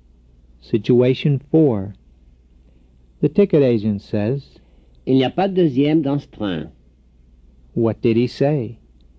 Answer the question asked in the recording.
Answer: He said there is no second class on this train.